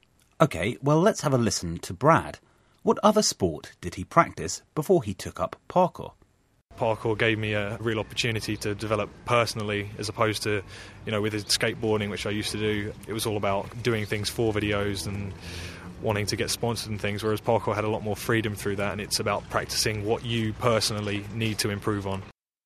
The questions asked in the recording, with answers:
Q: What other sport did he practice before he took up parkour?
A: Okay, so Brad was a skateboarder before becoming a parkour runner.